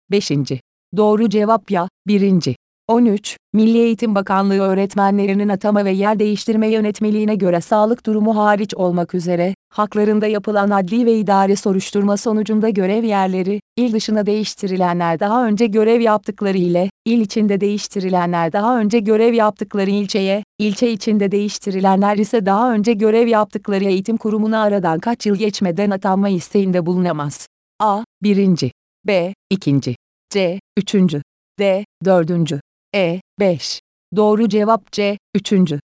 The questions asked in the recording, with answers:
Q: Milli Eğitim Bakanlığı öğretmenlerinin atama ve yer değiştirme yönetmeliğine göre sağlık durumu hariç olmak üzere, haklarında yapılan adli ve idari soruşturma sonucunda görev yerleri, il dışına değiştirilenler daha önce görev yaptıkları ile, il içinde değiştirilenler daha önce görev yaptıkları ilçeye, ilçe içinde değiştirilenler ise daha önce görev yaptıkları eğitim kurumuna aradan kaç yıl geçmeden atanma isteğinde bulunamaz.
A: Doğru cevap C. 3.